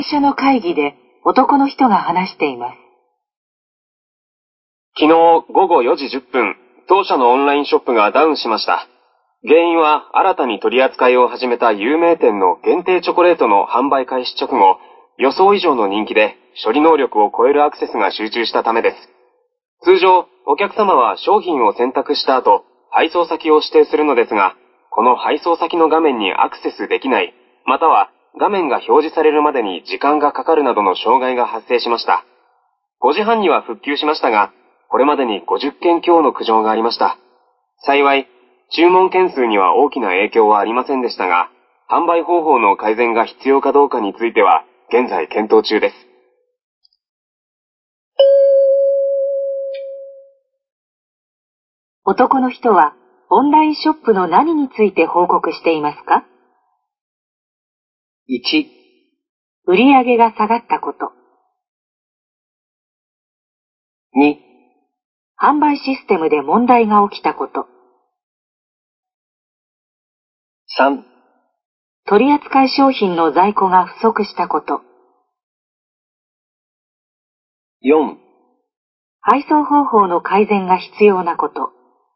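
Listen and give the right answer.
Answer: 2: 販売システムで問題が起きたこと。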